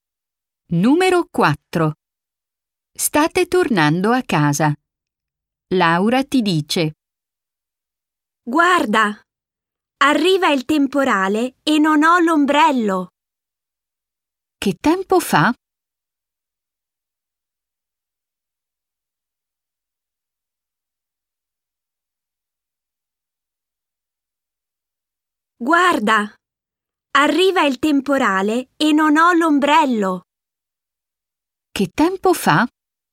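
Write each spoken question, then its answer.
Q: Che tempo fa?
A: C'è un temporale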